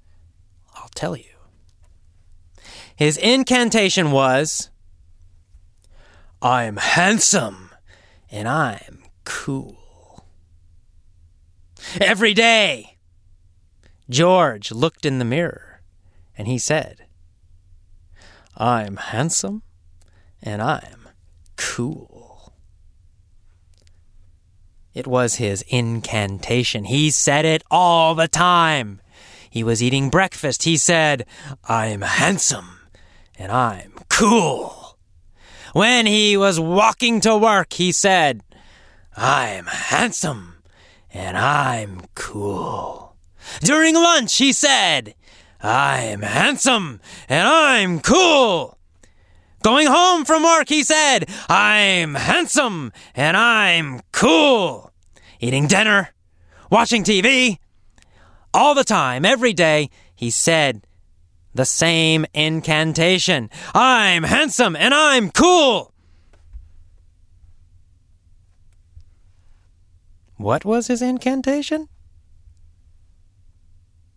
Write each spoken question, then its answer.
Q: What was his incantation?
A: His incantation was, "I'm handsome and I'm cool!"